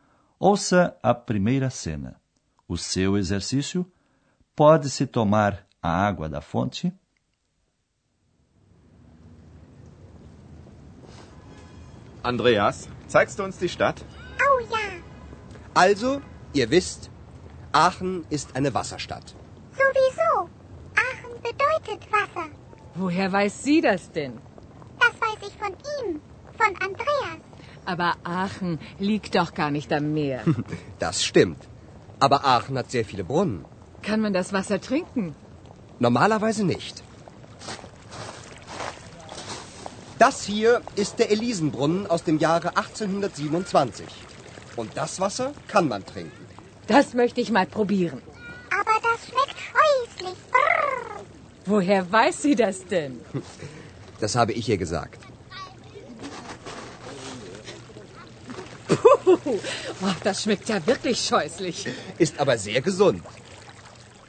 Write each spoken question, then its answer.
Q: pode-se tomar a água da fonte?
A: Normalmente não se pode tomar a água das fontes. mas a água de uma delas, a fonte Elise, pode ser tomada.